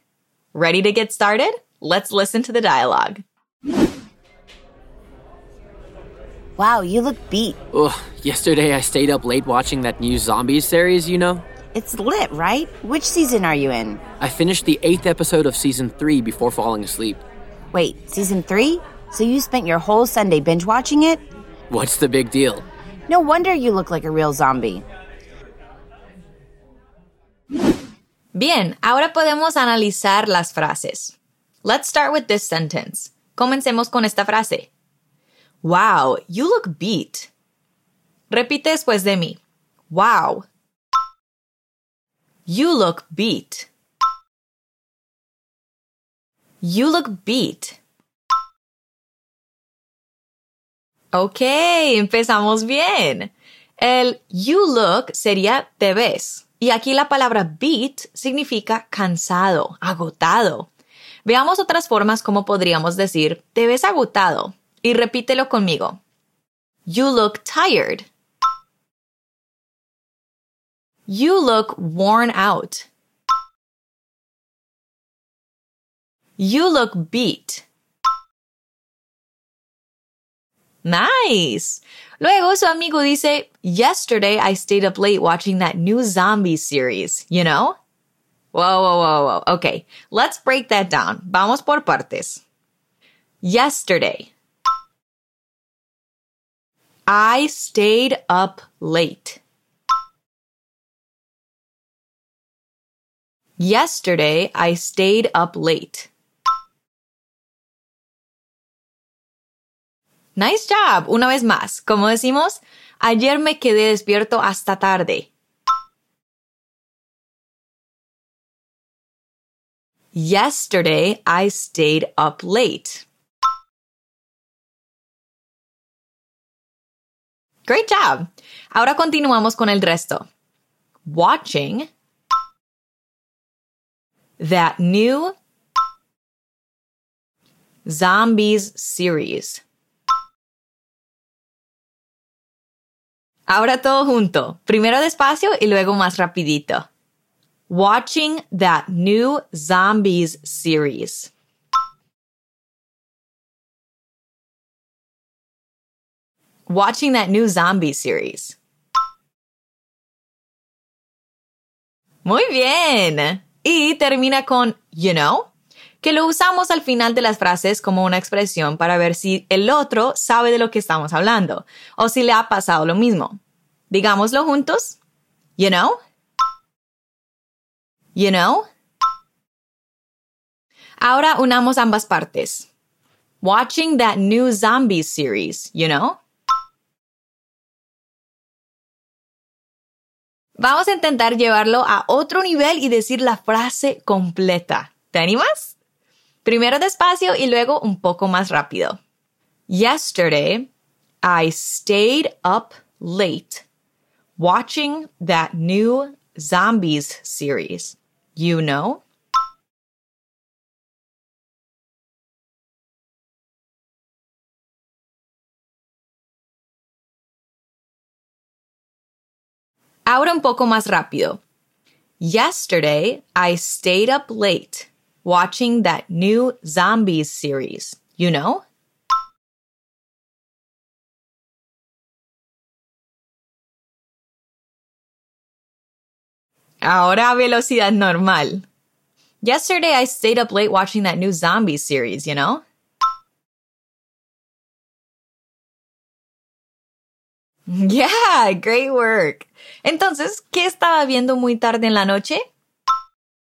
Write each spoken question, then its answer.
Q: Entonces, ¿qué estaba viendo muy tarde en la noche?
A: That new Zombies series. Una serie de zombies nueva.